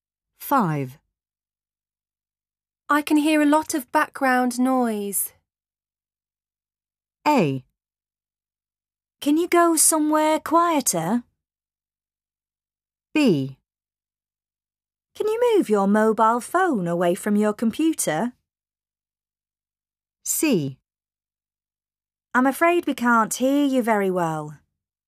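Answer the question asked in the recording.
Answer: A: Can you go somewhere quieter?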